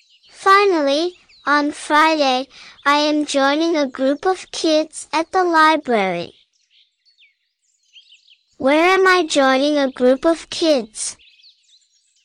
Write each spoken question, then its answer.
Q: Where am I joining a group of kids?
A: At the library. I'm joining a group of kids at the library.